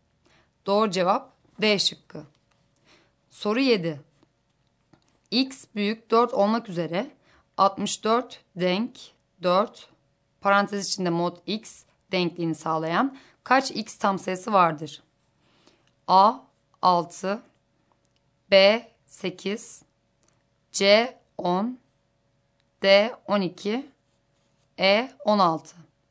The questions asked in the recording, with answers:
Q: X büyük 4 olmak üzere 64 denk 4 parantez içinde mod X denkliğini sağlayan kaç X tam sayısı vardır?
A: Doğru cevap B şıkkı.